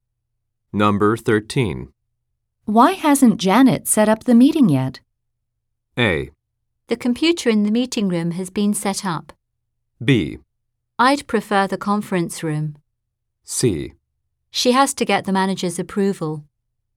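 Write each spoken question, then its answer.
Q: Why hasn't Janet set up the meeting yet?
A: C: She has to get the manager's approval.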